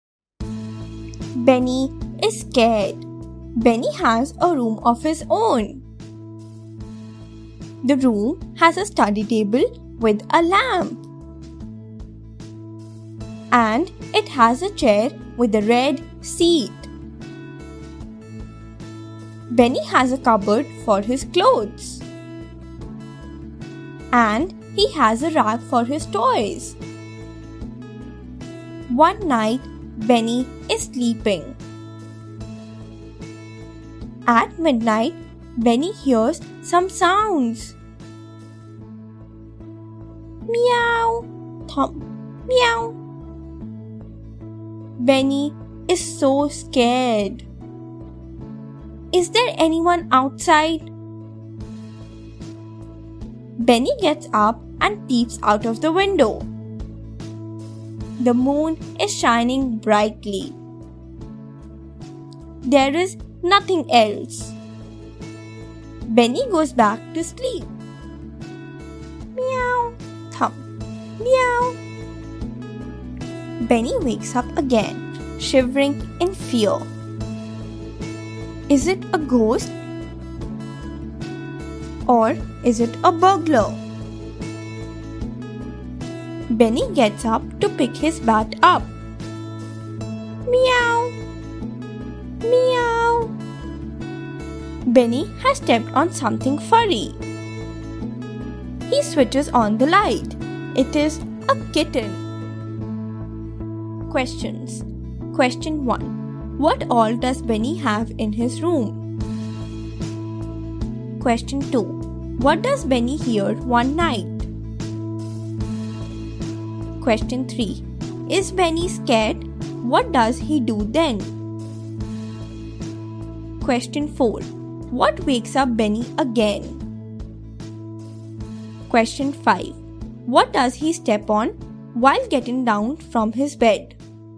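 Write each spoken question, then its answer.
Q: What all does Benny have in his room?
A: A study table with a lamp, a chair with a red seat, a cupboard for his clothes and a rack for his toys

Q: What does Benny hear one night?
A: Sounds: meow, thump, meow

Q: Is Benny scared? What does he do then?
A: Yes; he gets up and peeps out of the window

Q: What wakes up Benny again?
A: The sounds meow, thump, meow

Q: What does he step on while getting down from his bed?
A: A kitten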